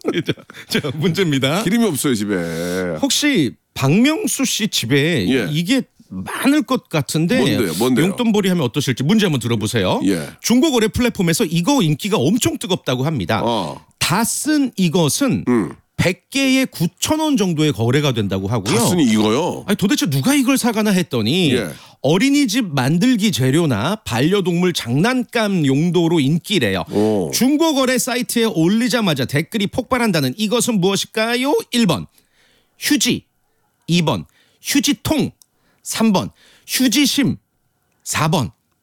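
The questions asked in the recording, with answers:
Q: 중고거래 사이트에 올리자마자 댓글이 폭발한다는 이것은 무엇일까요?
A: 3번: 휴지심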